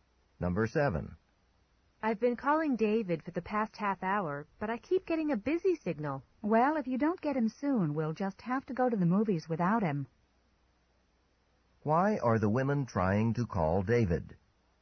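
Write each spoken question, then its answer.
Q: Why are the women trying to call David?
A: To invite him to go to the movies with them.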